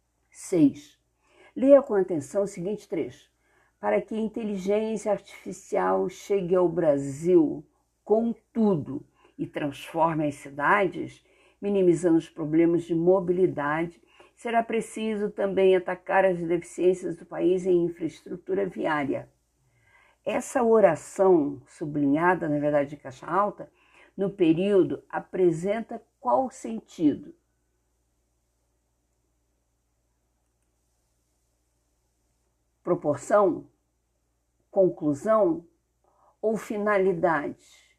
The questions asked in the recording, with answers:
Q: Essa oração, sublinhada, na verdade, de caixa alta, no período apresenta qual sentido?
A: a fim de, a fim de que, finalidade, a letra que corresponde à opção correta é a letra C.